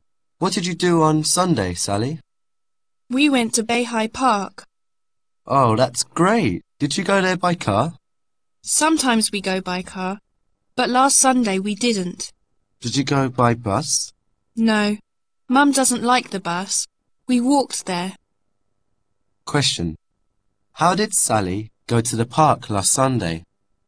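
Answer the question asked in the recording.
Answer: She walked there.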